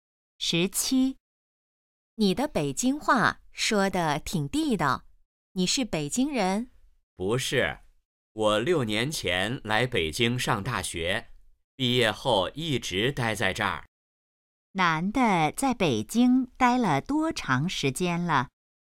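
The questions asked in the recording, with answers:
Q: 男的在北京待了多长时间了?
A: 六年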